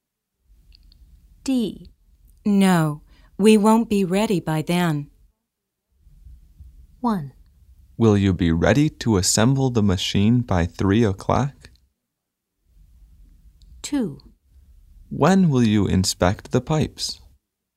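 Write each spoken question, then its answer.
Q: No, we won't be ready by then.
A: 1: Will you be ready to assemble the machine by 3 o'clock?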